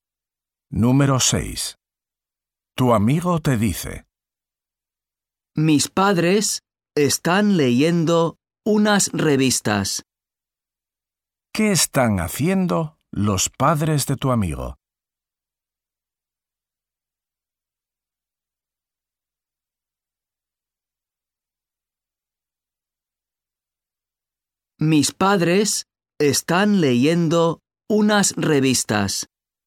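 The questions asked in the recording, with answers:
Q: ¿Qué están haciendo los padres de tu amigo?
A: Leyendo unas revistas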